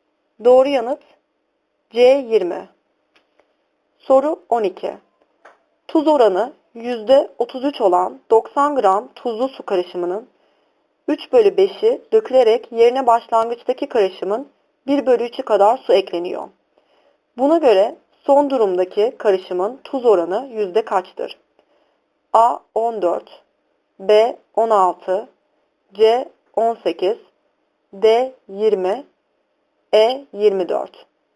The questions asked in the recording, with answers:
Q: Buna göre son durumdaki karışımın tuz oranı yüzde kaçtır?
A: Doğru yanıt C 18.